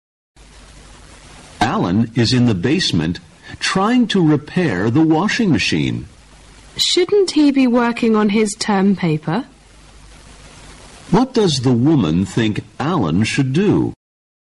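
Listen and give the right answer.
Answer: Work on his term paper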